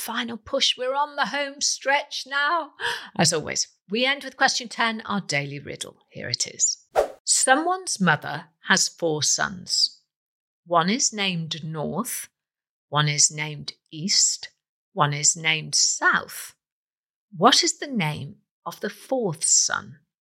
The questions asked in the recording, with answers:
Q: What is the name of the 4th son?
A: And the answer is someone.